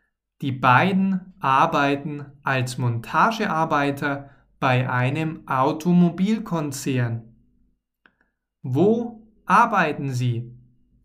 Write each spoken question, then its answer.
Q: Wo arbeiten Sie?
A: Bei einem Automobilkonzern.